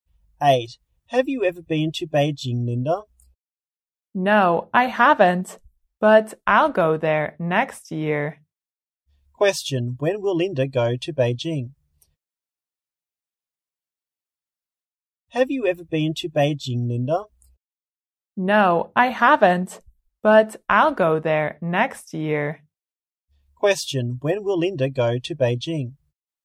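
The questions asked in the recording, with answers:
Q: when will Linda go to Beijing?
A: Next year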